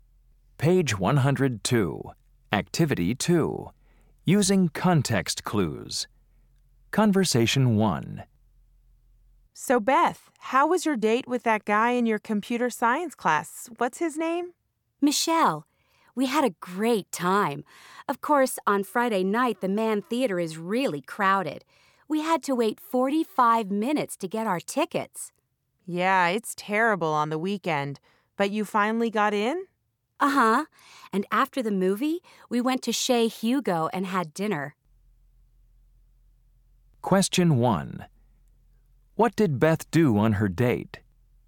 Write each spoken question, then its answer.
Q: What did Beth do on her date?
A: So you went to a movie and then to a restaurant too, huh?